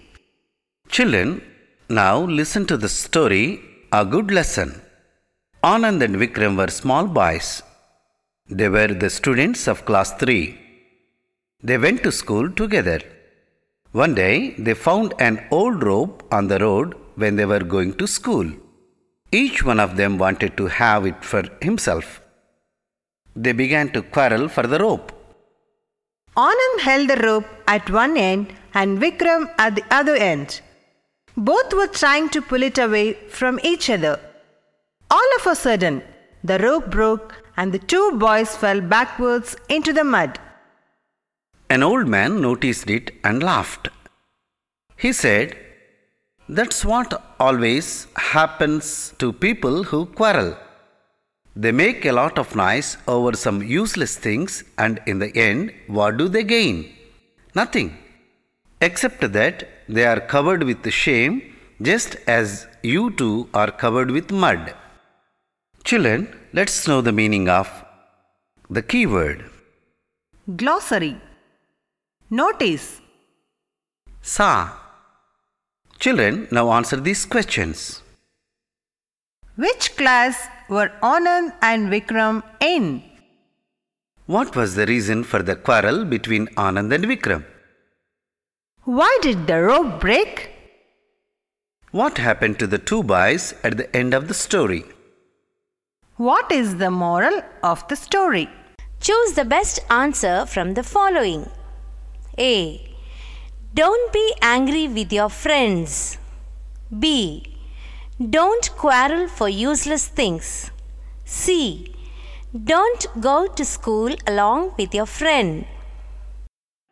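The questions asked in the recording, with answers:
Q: Which class were Anand and Vikram in?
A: Class 3

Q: What was the reason for the quarrel between Anand and Vikram?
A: Each wanted the old rope for himself

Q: Why did the rope break?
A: Both boys pulled it from opposite ends

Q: What happened to the two boys at the end of the story?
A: They fell backwards into the mud

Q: What is the moral of the story?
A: B: Don't quarrel for useless things.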